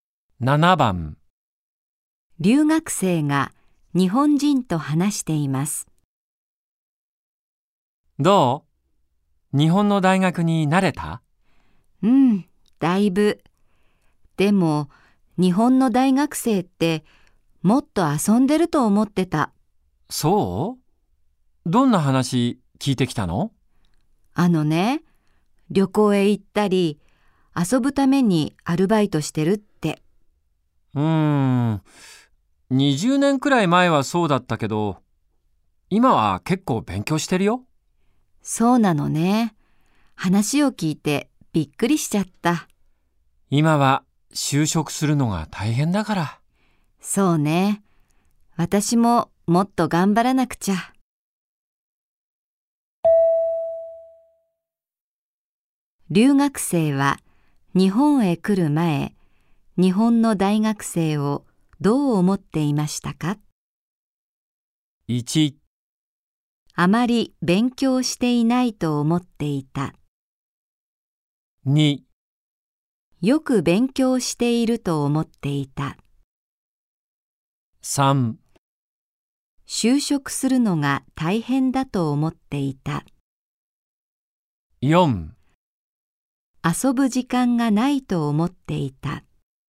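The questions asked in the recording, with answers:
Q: 留学生は日本へ来る前、日本の大学生をどう思っていましたか?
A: 1: あまり勉強していないと思っていた。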